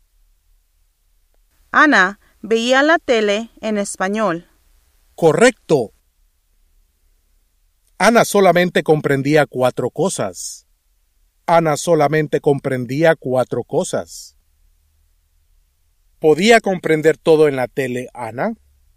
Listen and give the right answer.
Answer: No.